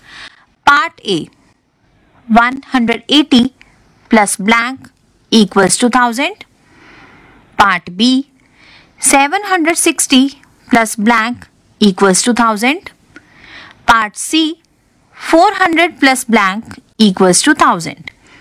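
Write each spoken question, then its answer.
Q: Part A. 180 plus blank equals to 1000.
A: 820

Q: Part B. 760 plus blank equals to 1000.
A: 240

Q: Part C. 400 plus blank equals to 1000.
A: 600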